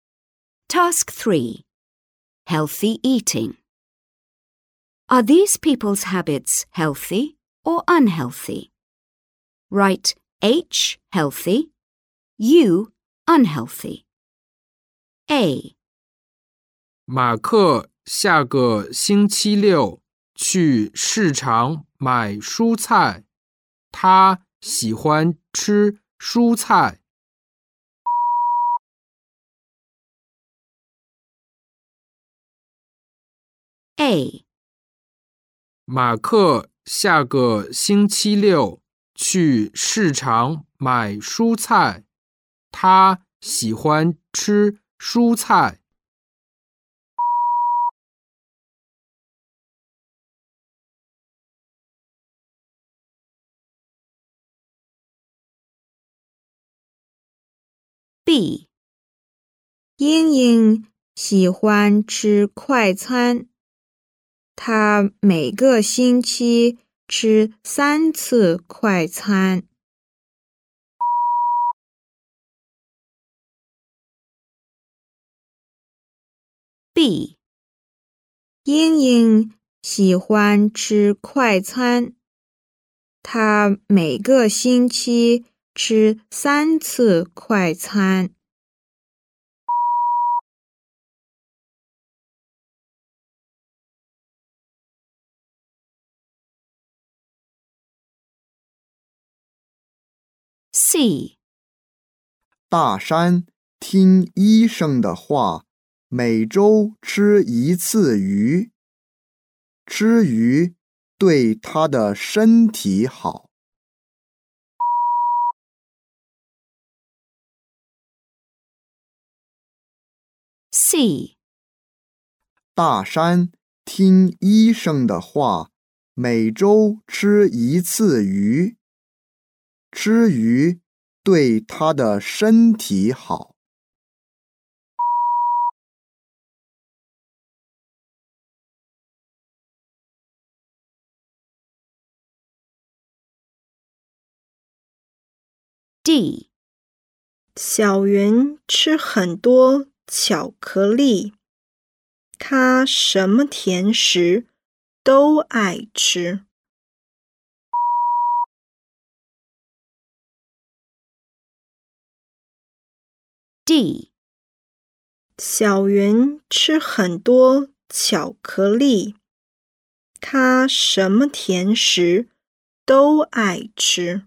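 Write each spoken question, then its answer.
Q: Are these people's habits healthy or unhealthy?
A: H (healthy)

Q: Are these people's habits healthy or unhealthy?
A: U (unhealthy)

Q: Are these people's habits healthy or unhealthy?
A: H (healthy)

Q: Are these people's habits healthy or unhealthy?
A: U (unhealthy)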